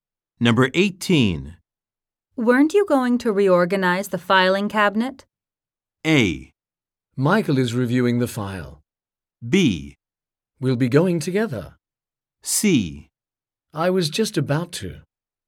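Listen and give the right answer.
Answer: C: I was just about to.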